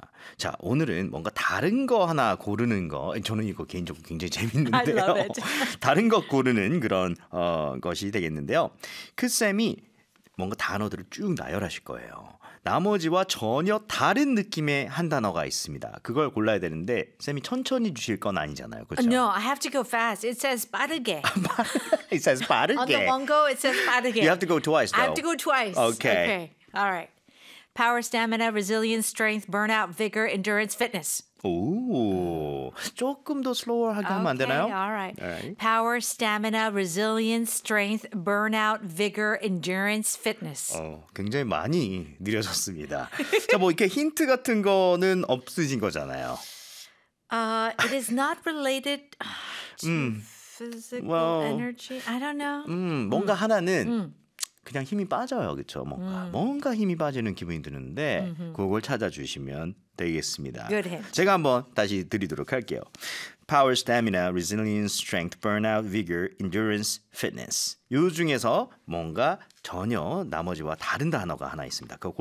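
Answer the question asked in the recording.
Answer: burnout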